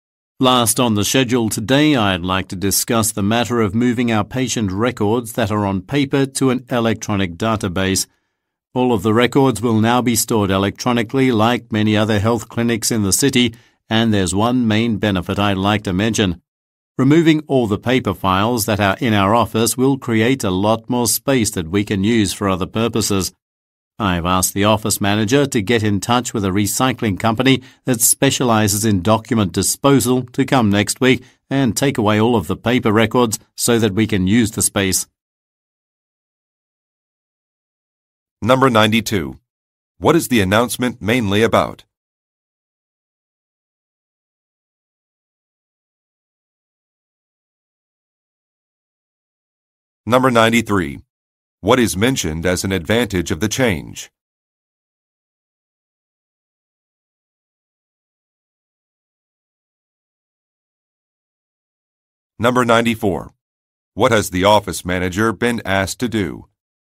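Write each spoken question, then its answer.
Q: What is the announcement mainly about?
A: Moving paper patient records to an electronic database

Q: What is mentioned as an advantage of the change?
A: It will create more office space

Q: What has the office manager been asked to do?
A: Contact a recycling company to take away the paper records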